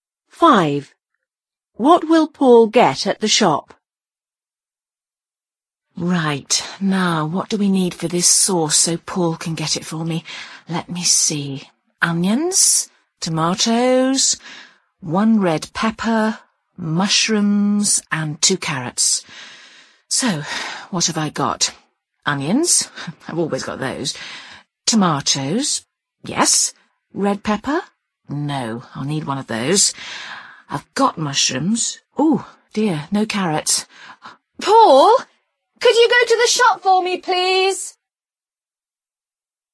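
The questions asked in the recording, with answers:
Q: What will Paul get at the shop?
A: A red pepper and carrots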